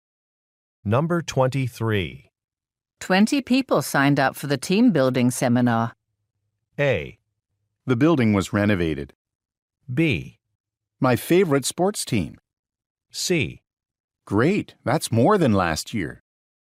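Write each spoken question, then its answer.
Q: 20 people signed up for the team building seminar.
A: C: Great, that's more than last year.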